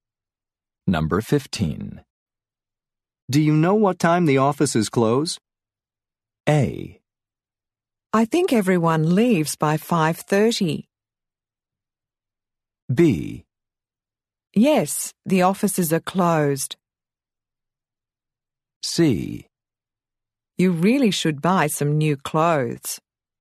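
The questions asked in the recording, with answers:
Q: Do you know what time the offices close?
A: A: I think everyone leaves by 5:30.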